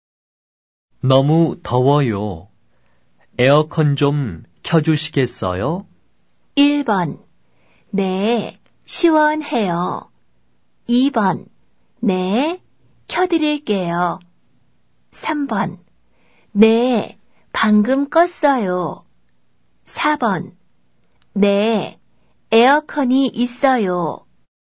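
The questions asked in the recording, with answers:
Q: 너무 더워요. 에어컨 좀 켜주시겠어요?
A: 2: 네, 켜드릴게요.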